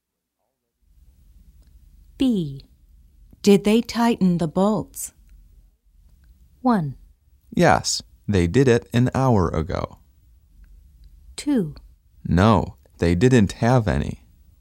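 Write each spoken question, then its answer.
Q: Did they tighten the bolts?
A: 1: Yes, they did it an hour ago.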